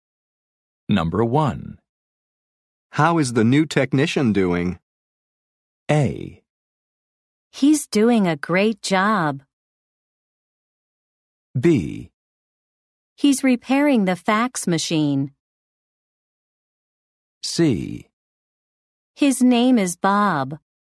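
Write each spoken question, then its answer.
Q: How is the new technician doing?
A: A: He's doing a great job.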